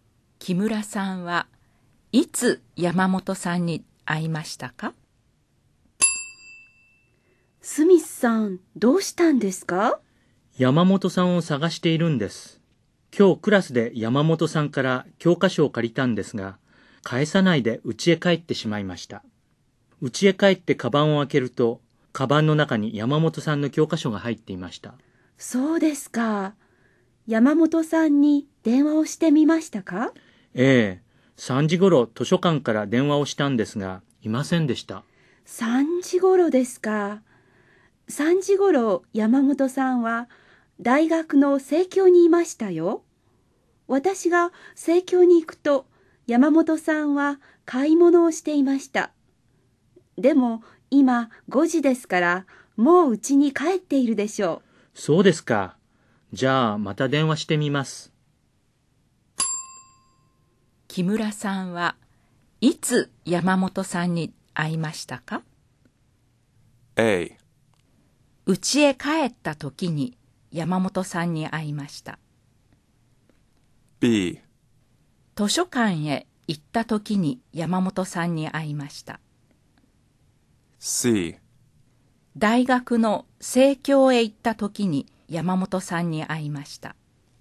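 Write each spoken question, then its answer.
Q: 木村さんはいつ山本さんに会いましたか?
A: C: 大学の生協へ行った時に山本さんに会いました。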